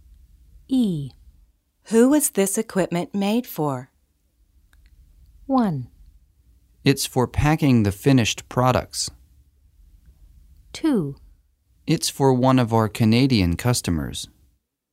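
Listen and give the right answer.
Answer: 2: It's for one of our Canadian customers.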